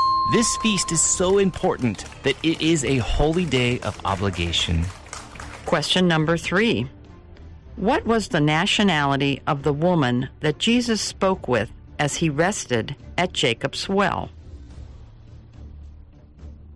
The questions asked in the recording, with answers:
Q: What was the nationality of the woman that Jesus spoke with as he rested at Jacob's well?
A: The answer? Samaritan.